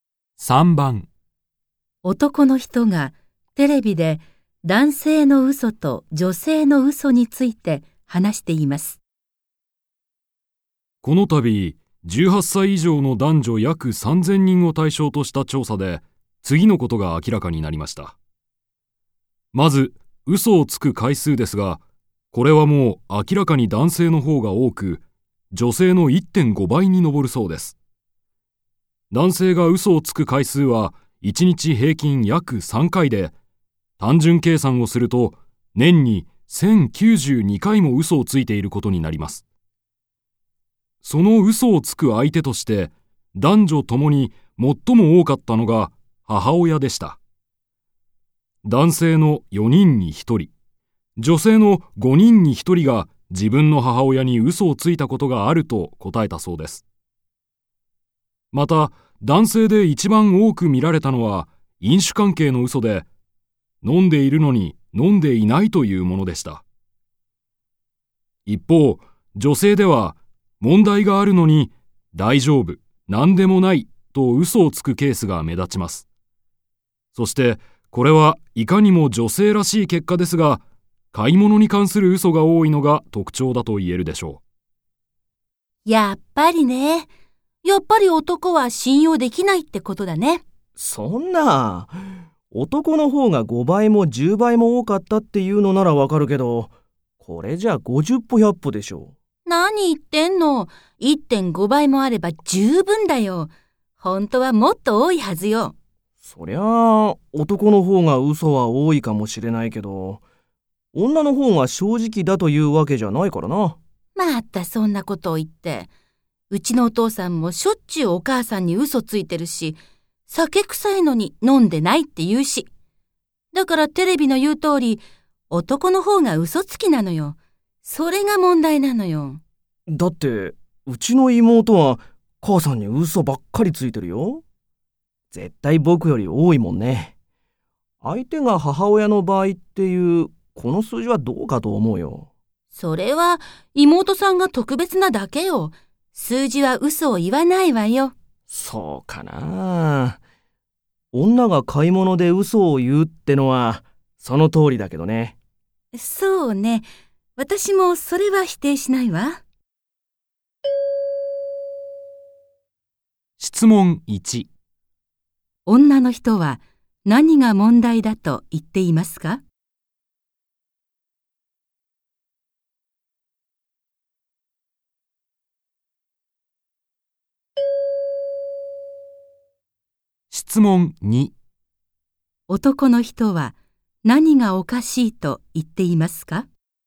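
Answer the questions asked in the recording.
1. 男の方が女より嘘をつくこと
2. 嘘をつく相手が母親の場合の数字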